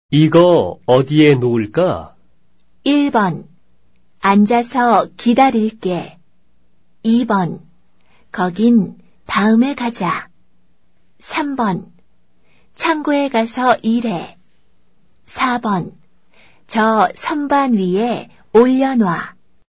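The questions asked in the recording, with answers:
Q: 이거 어디에 놓을까?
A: 4번: 저 선반 위에 올려놔.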